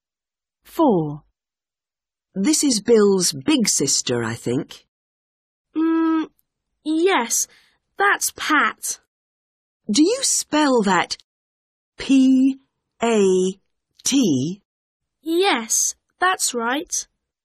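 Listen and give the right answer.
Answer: Pat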